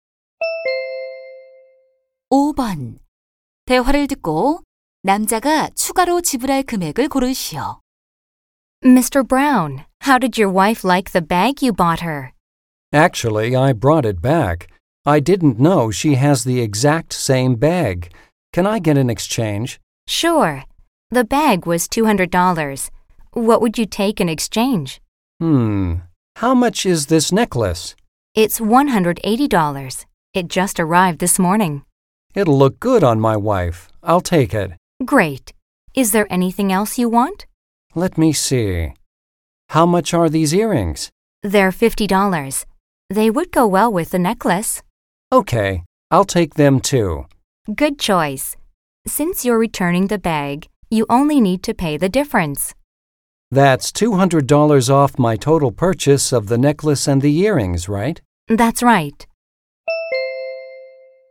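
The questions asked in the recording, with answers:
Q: 대화를 듣고 남자가 추가로 지불할 금액을 고르시오.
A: 30달러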